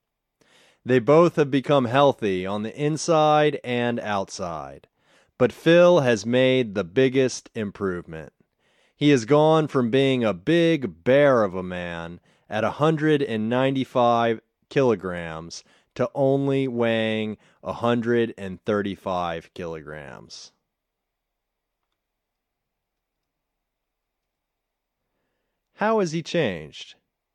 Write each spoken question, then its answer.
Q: How has he changed?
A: He has gone from being a big bear of a man at 195 kilograms to only weighing 135 kilograms.